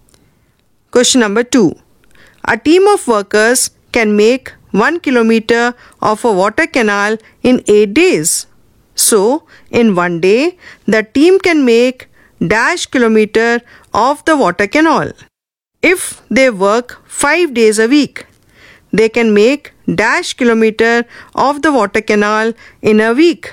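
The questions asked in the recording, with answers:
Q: So, in one day, the team can make dash kilometer of the water canal.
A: 1/8 kilometer

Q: If they work 5 days a week, they can make dash kilometer of the water canal in a week.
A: 5/8 kilometer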